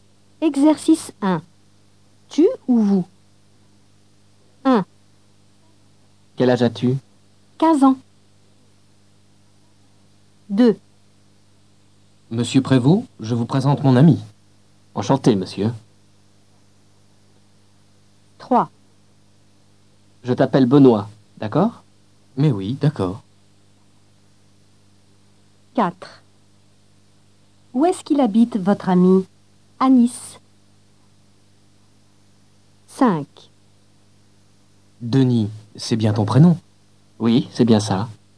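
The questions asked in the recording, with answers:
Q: Tu ou vous?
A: tu

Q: Tu ou vous?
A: vous

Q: Tu ou vous?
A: tu

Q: Tu ou vous?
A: vous

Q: Tu ou vous?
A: tu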